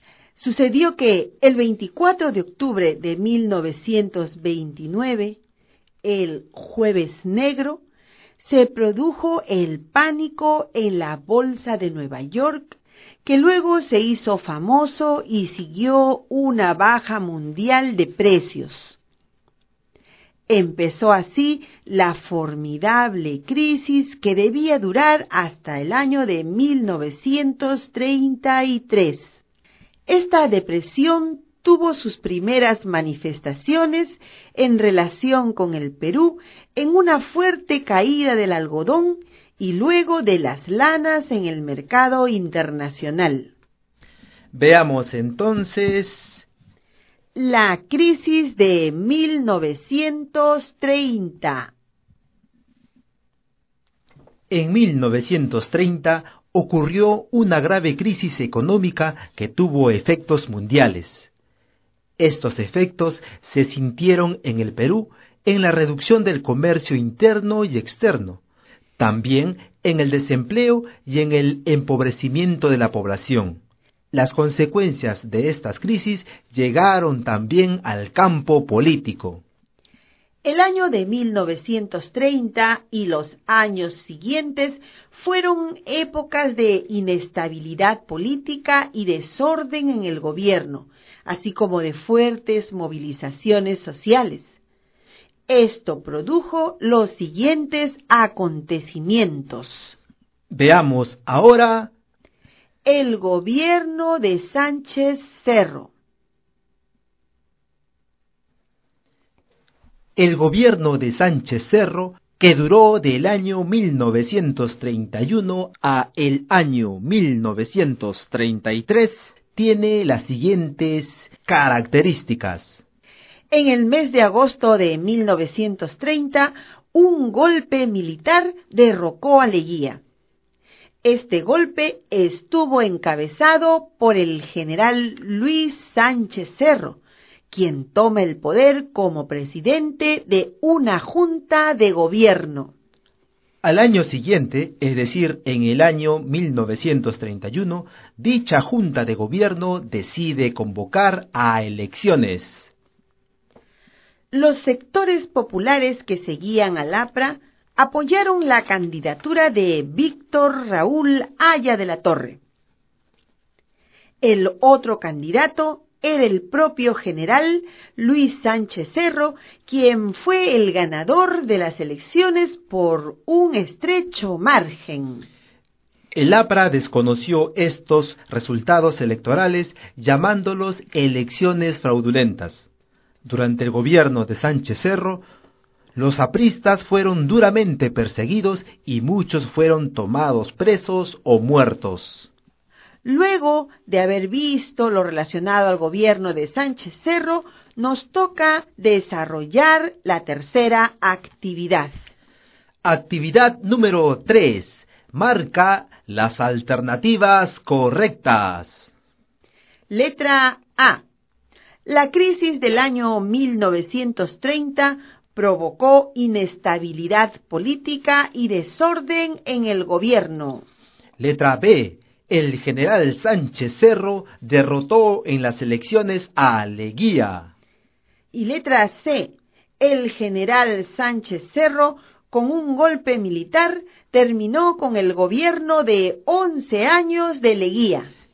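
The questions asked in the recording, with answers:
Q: Letra A. La crisis del año 1930 provocó inestabilidad política y desorden en el gobierno.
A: Correcta

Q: Letra B. El general Sánchez Cerro derrotó en las elecciones a Leguía.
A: Incorrecta

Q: Y letra C. El general Sánchez Cerro, con un golpe militar, terminó con el gobierno de 11 años de Leguía.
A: Correcta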